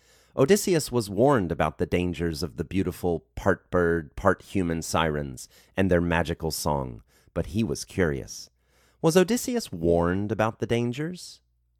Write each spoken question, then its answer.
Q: Was Odysseus warned about the dangers?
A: Yes, Odysseus was warned about the dangers.